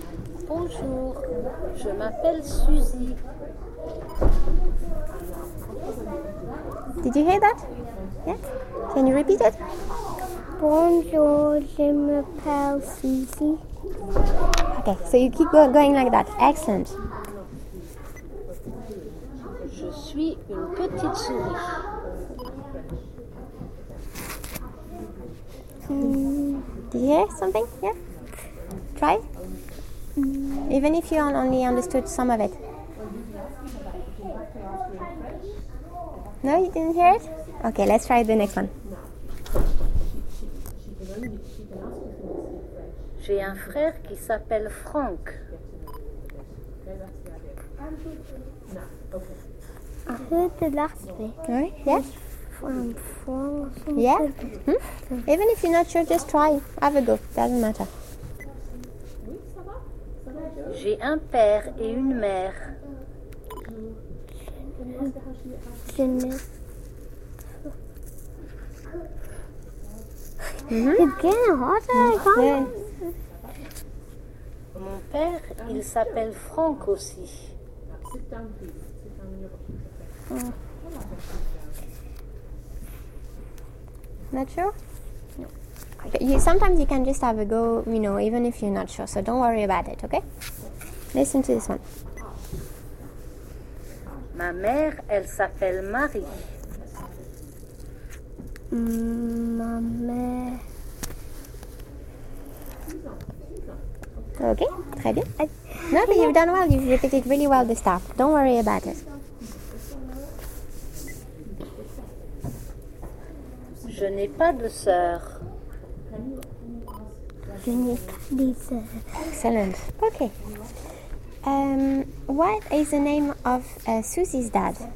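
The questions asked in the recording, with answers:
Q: What is the name of Susie's dad?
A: Franck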